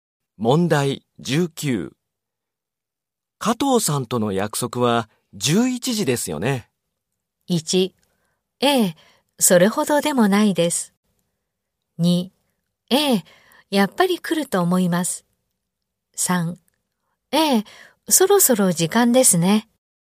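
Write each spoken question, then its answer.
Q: 加藤さんとの約束は11時ですよね。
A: 1: ええ、そろそろ時間ですね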